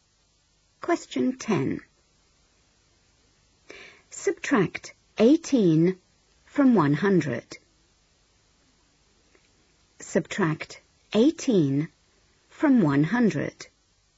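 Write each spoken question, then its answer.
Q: Subtract 18 from 100.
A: 82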